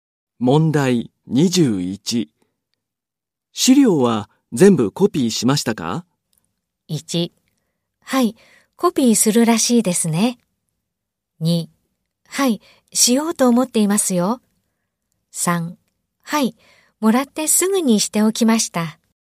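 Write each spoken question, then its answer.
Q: 資料は全部コピーしましたか?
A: 1: はい、もらってすぐにしておきました。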